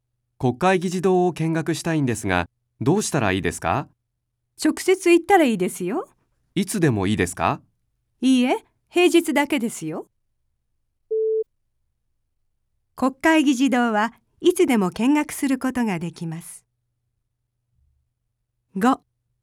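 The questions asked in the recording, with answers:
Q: 国会議事堂はいつでも見学することができます。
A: 正しくない(×):平日だけ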